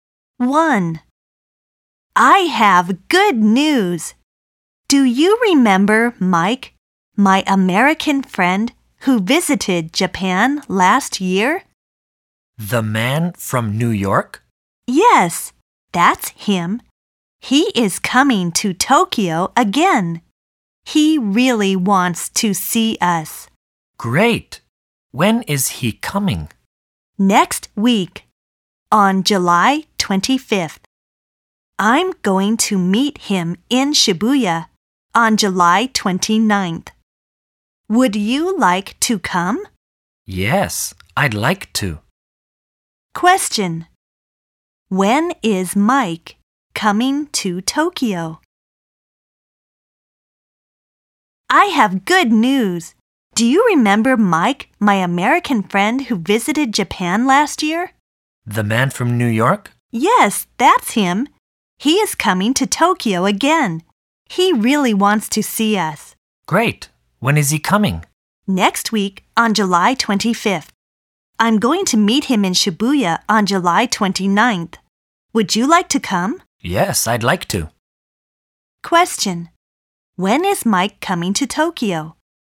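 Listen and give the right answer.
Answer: Next week, on July 25th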